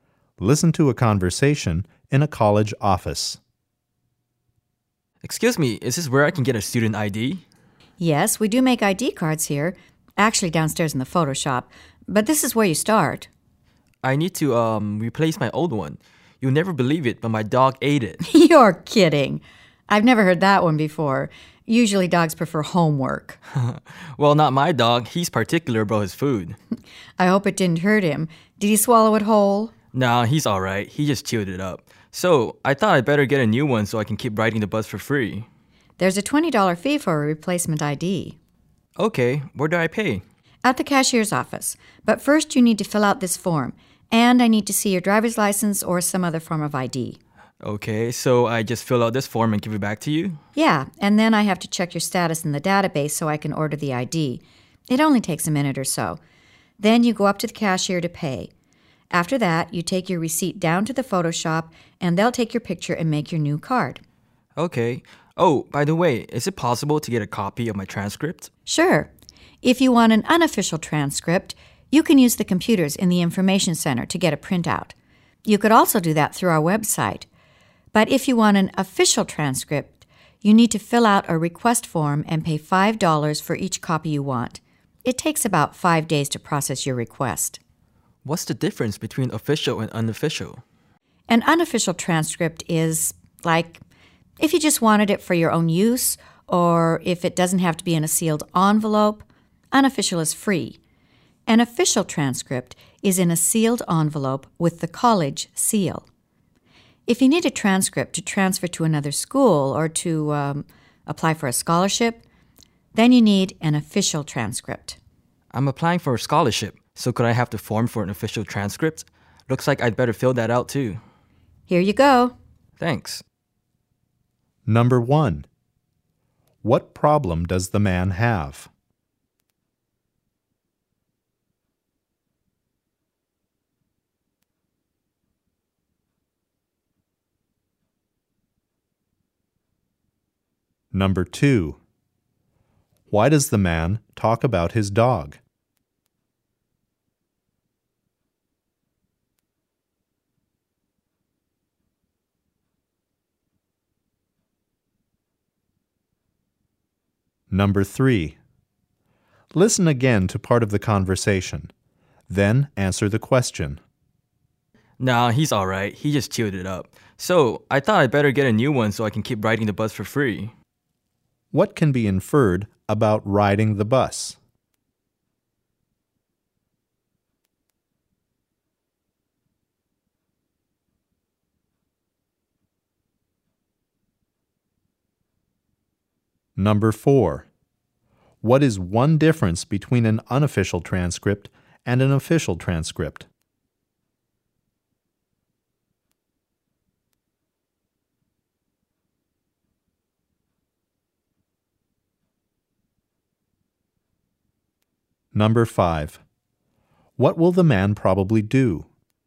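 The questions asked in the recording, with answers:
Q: What problem does the man have?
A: He needs to replace his student ID card because his dog chewed it up.

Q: Why does the man talk about his dog?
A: To explain why he needs a new ID card.

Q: What can be inferred about riding the bus?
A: Students can ride the bus for free if they show a student ID.

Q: What is one difference between an unofficial transcript and an official transcript?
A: An official transcript comes in a sealed envelope and costs $5, but an unofficial one is free.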